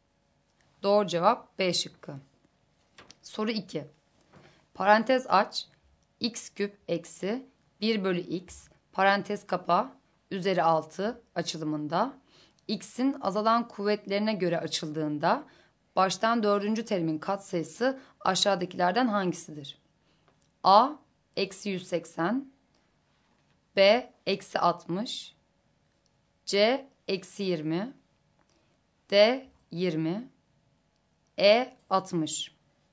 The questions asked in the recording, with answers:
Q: Parantez aç, x küp eksi 1 bölü x parantez kapa üzeri 6 açılımında x'in azalan kuvvetlerine göre açıldığında baştan dördüncü terimin katsayısı aşağıdakilerden hangisidir?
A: Doğru cevap C şıkkı.